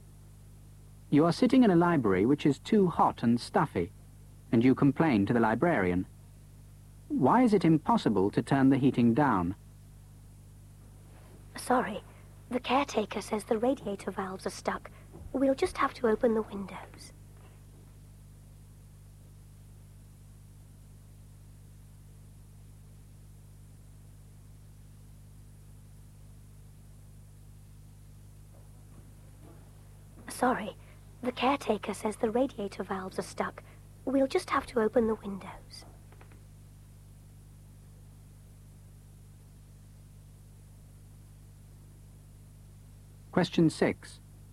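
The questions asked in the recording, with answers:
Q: Why is it impossible to turn the heating down?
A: The radiator valves are stuck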